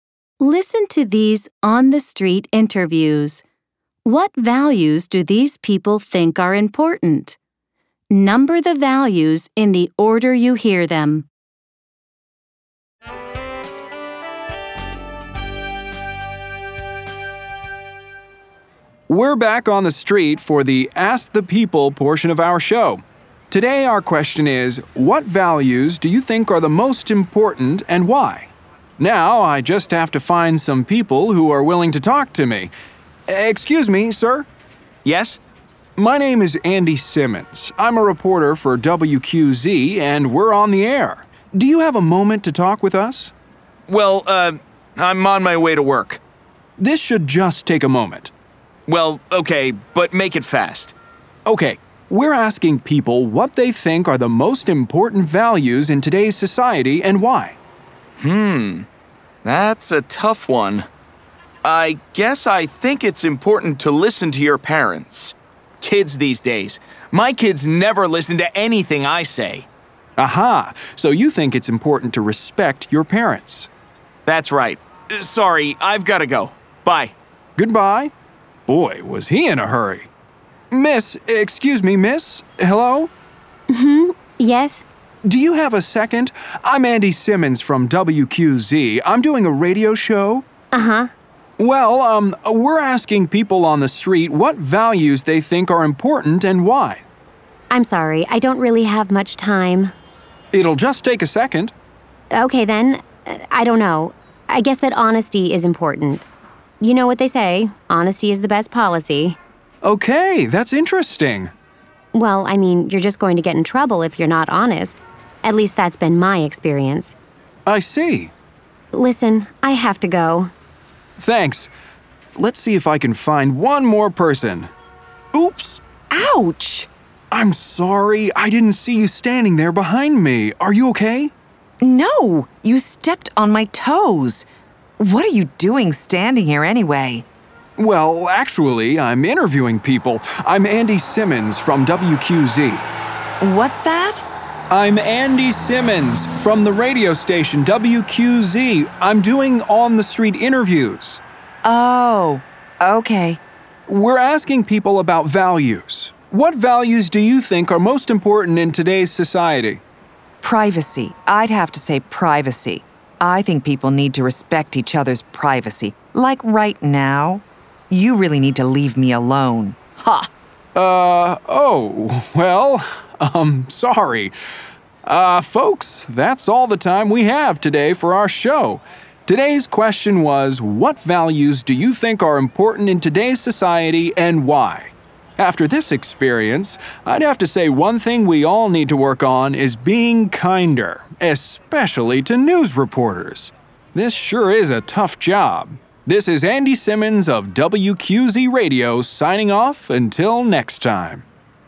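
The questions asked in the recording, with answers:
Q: What values do these people think are important?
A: Respecting your parents, honesty, and privacy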